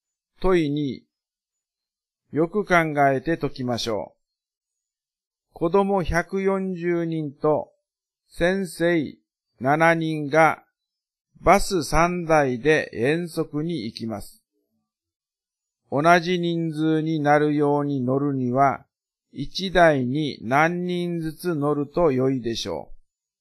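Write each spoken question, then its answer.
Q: 子供140人と先生7人がバス3台で遠足に行きます。同じ人数になるように乗るには、1台に何人ずつ乗ると良いでしょう。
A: 49人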